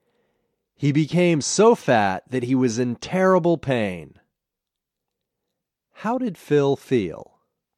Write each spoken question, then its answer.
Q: How did Phil feel?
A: Phil was in terrible pain.